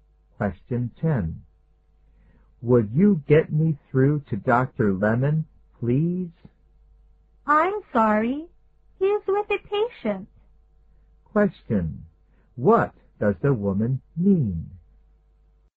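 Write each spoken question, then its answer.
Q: What does the woman mean?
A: Dr. Lemon is busy with a patient and can't take the call now.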